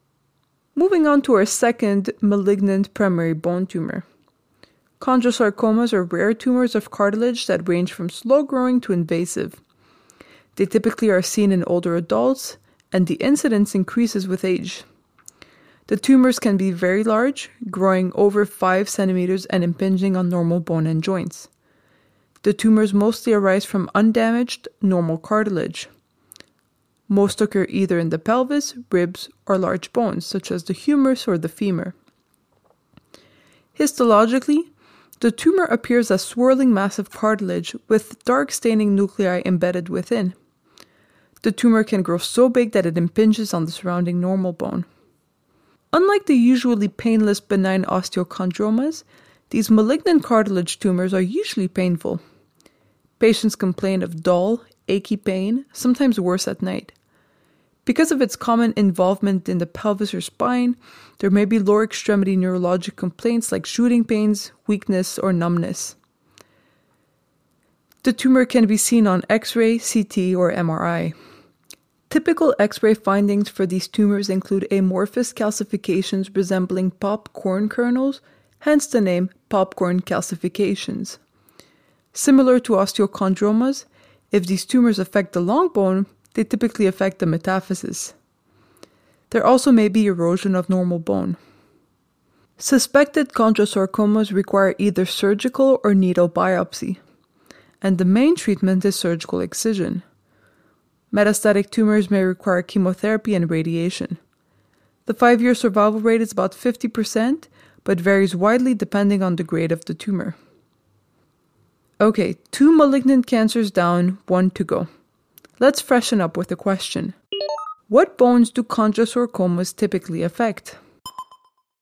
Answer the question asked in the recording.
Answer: Most chondrosarcomas occur in either the pelvis, ribs, or large bones.